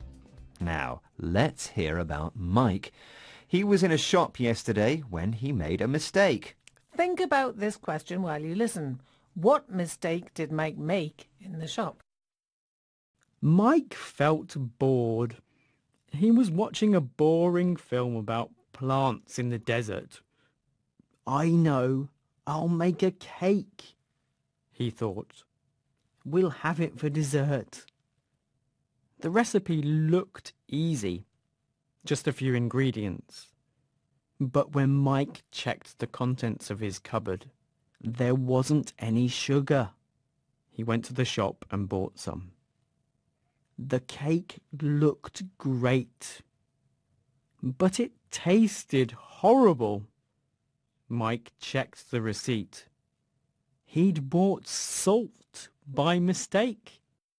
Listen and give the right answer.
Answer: he bought salt instead of sugar.